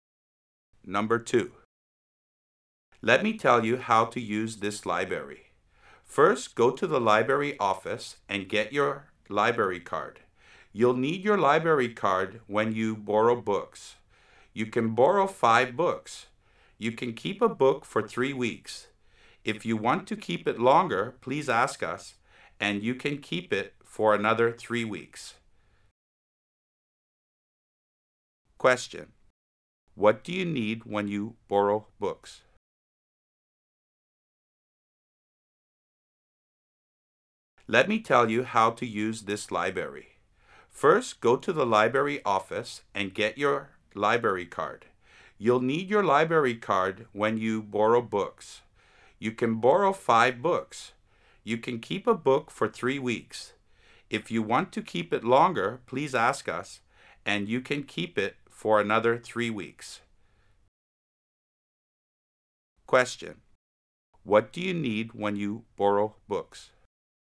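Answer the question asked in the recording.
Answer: A library card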